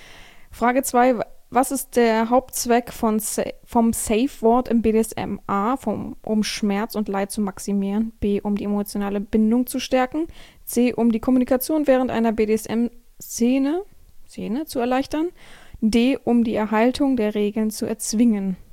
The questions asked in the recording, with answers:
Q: Was ist der Hauptzweck vom Safe Word im BDSM?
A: Antwort Nummer 2, C, die Kommunikation während der BDSM-Szene zu erleichtern, auch richtig.